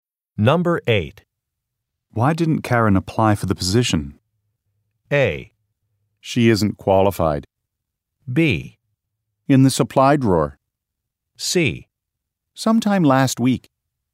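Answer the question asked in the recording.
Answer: A: She isn't qualified.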